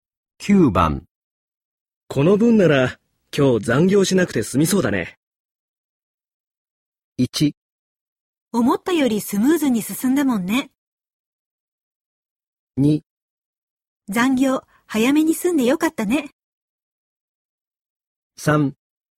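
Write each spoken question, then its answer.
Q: この分なら今日残業しなくて済みそうだね。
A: 1: 思ったよりスムーズに進んだもんね。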